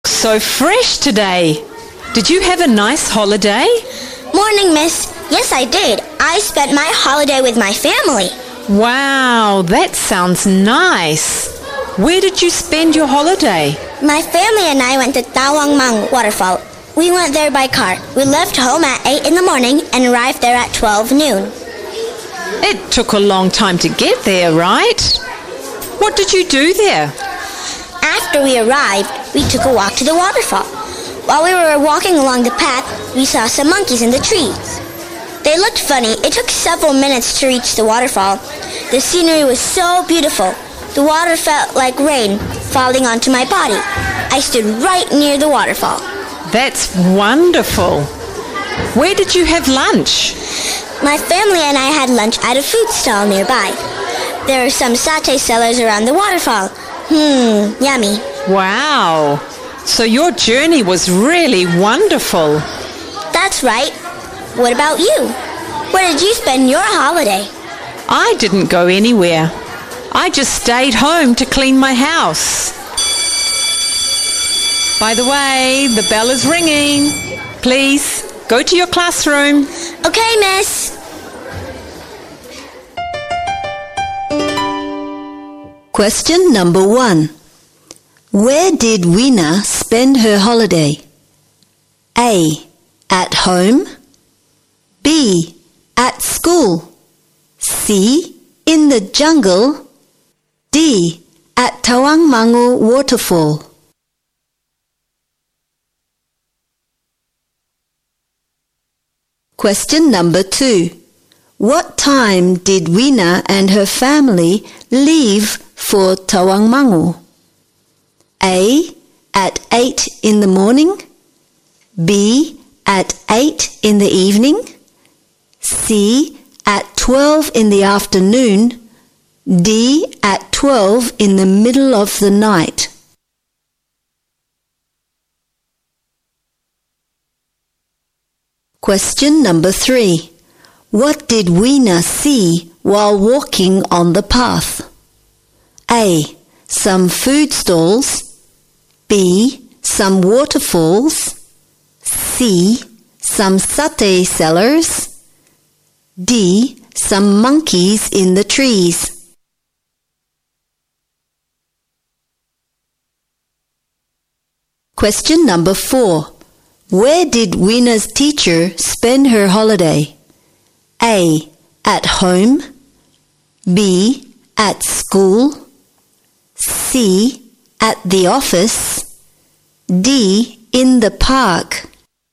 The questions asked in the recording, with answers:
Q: Where did Weena spend her holiday?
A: D. At Tawang Mangu Waterfall.

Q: What time did Weena and her family leave for Tawang Mangu?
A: A. At 8 in the morning.

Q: What did Weena see while walking on the path?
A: D. Some monkeys in the trees.

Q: Where did Weena's teacher spend her holiday?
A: A. At home.